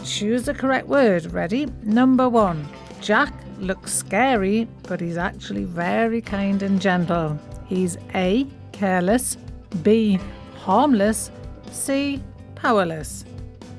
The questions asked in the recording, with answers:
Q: Jack looks scary, but he's actually very kind and gentle. He's A, careless, B, harmless, C, powerless.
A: And the answer is B, harmless.